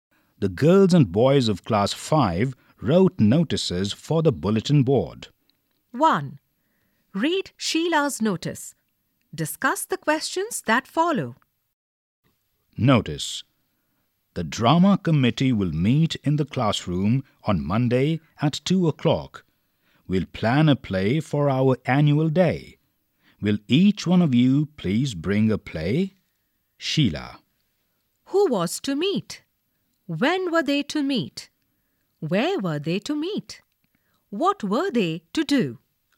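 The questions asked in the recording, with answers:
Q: Who was to meet?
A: The drama committee

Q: When were they to meet?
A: On Monday at 2 o'clock

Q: Where were they to meet?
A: In the classroom

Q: What were they to do?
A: Plan a play for the annual day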